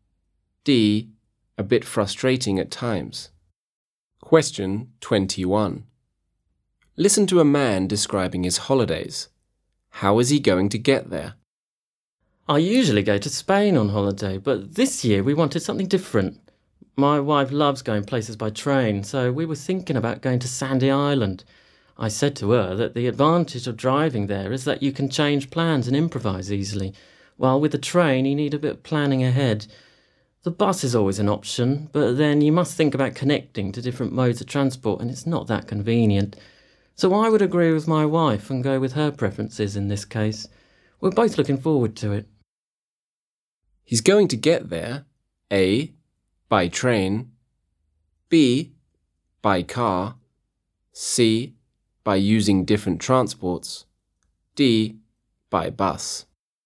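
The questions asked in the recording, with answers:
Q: How is he going to get there?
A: A: by train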